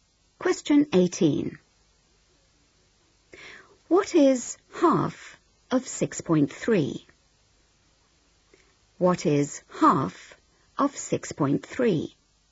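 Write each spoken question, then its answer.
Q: What is half of 6.3?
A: 3.15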